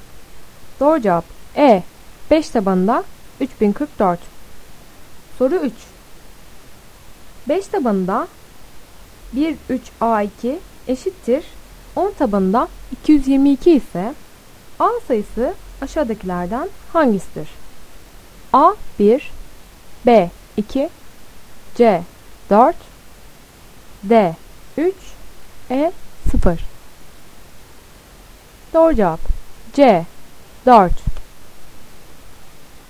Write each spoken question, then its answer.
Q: 5 tabanında 13A2 eşittir 10 tabanında 222 ise A sayısı aşağıdakilerden hangisidir?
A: Doğru cevap C 4